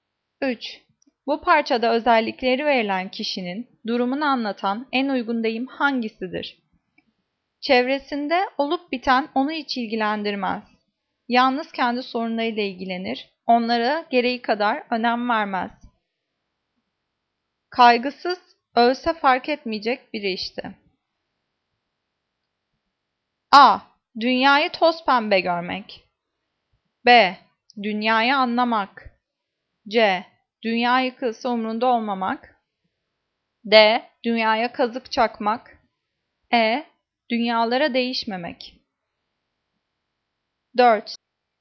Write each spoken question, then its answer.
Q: Bu parçada özellikleri verilen kişinin durumunu anlatan en uygun deyim hangisidir?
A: Cevap C. Dünya yıkılsa umrunda olmamak.